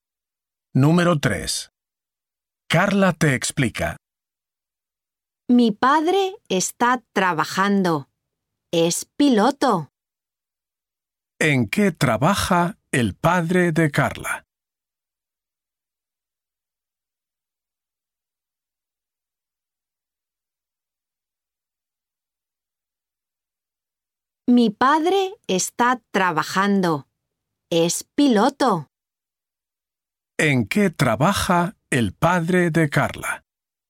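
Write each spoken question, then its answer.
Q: ¿En qué trabaja el padre de Carla?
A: Es piloto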